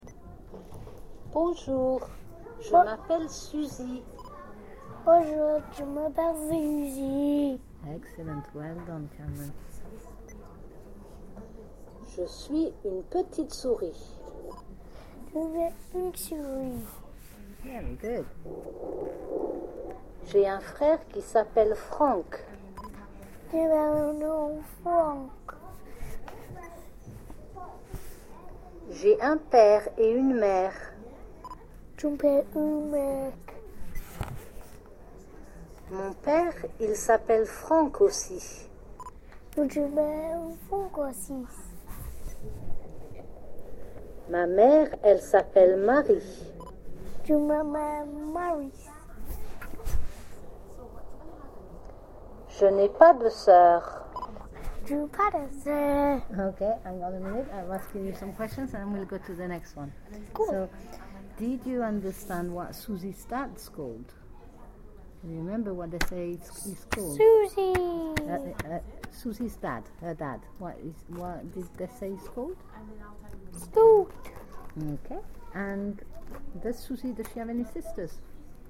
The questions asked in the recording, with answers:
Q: And does Susie, does she have any sisters?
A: No.